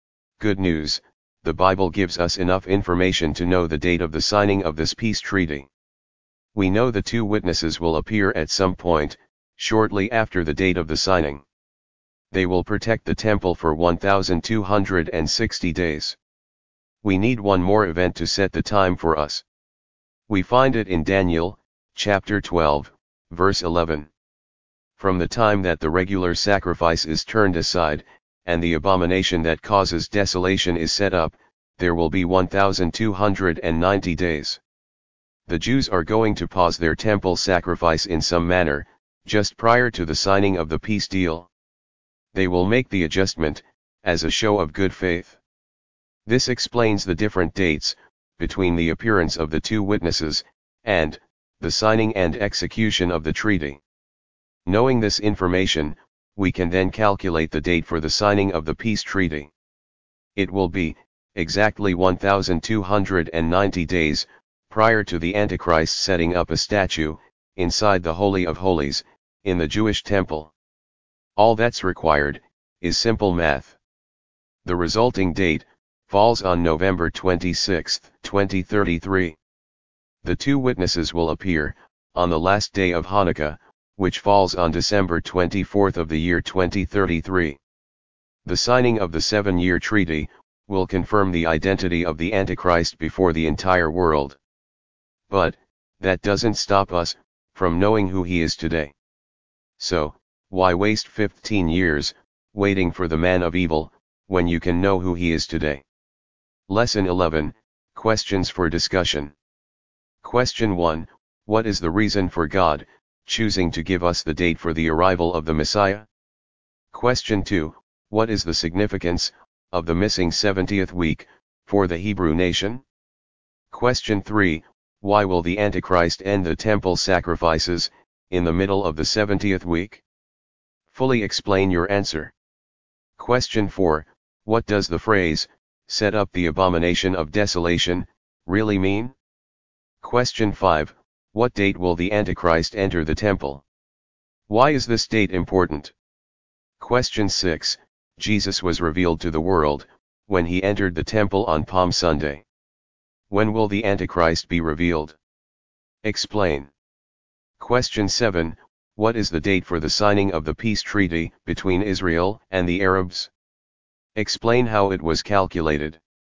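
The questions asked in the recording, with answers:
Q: what is the date for the signing of the peace treaty between Israel and the Arabs?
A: November 26, 2033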